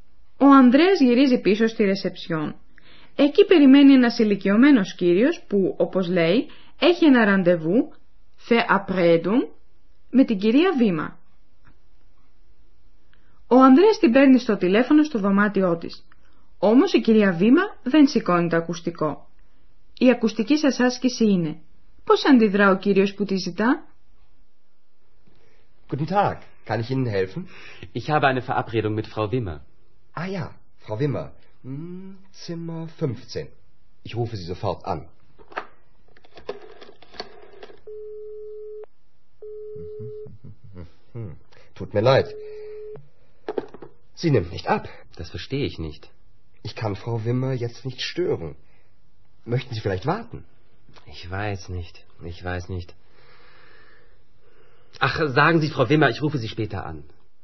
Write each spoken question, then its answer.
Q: Πώς αντιδρά ο κύριος που τη ζητά?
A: Ο κύριος παρακαλεί να διαβιβαστεί στην κυρία Βήμα πώς θα της τηλεφωνήσει αργότερα.